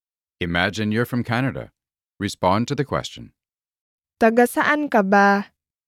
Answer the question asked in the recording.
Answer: Taga Canada ako.